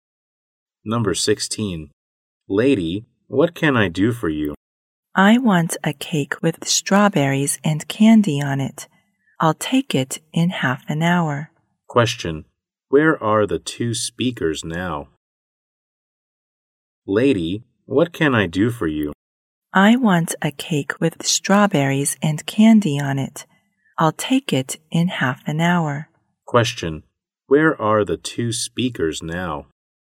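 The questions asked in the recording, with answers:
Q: Where are the two speakers now?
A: In a cake shop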